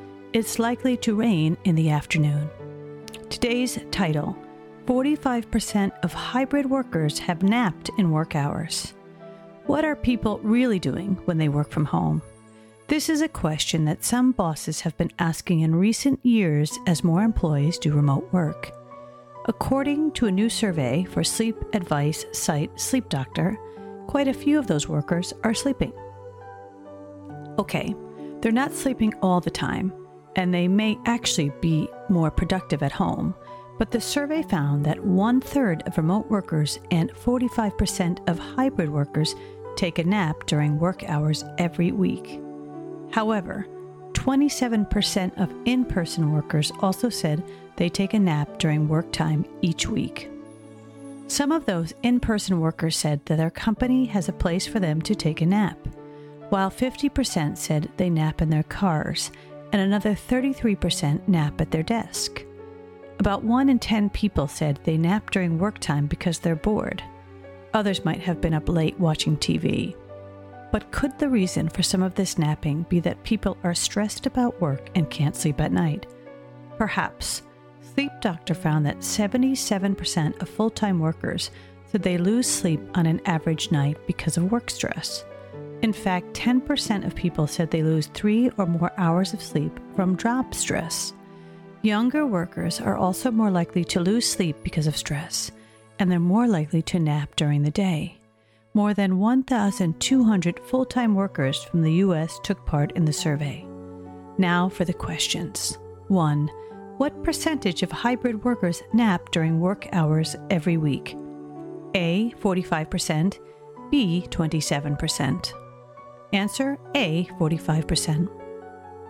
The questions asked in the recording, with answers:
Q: What percentage of hybrid workers nap during work hours every week?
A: Answer A, 45%.